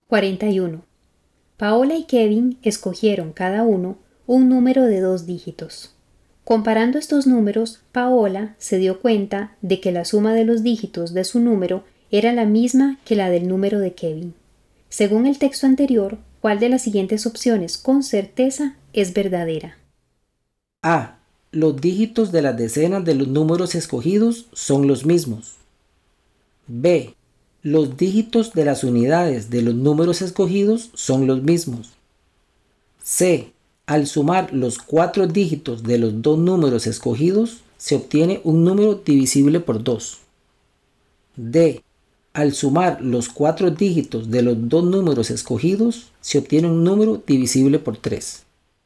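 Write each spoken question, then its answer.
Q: Según el texto anterior, ¿cuál de las siguientes opciones con certeza es verdadera?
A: C: Al sumar los cuatro dígitos de los dos números escogidos, se obtiene un número divisible por 2.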